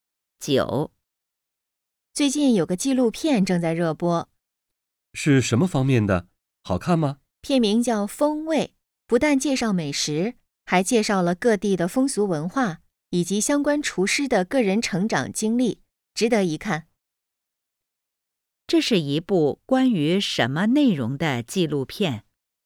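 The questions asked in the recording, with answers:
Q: 这是一部关于什么内容的纪录片?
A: 美食、各地风俗文化和厨师的成长经历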